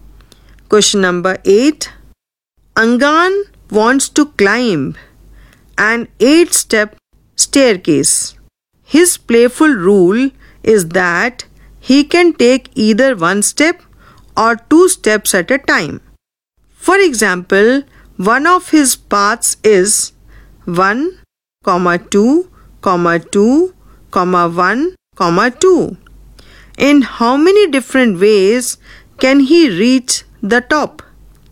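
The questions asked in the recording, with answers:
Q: In how many different ways can he reach the top?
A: 34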